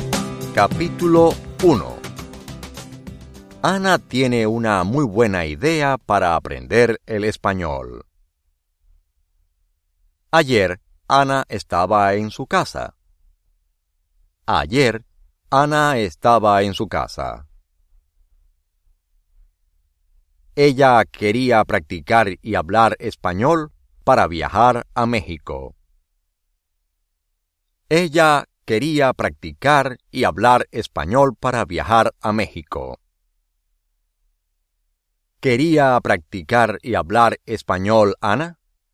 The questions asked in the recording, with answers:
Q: ¿Quería practicar y hablar español, Ana?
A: Sí.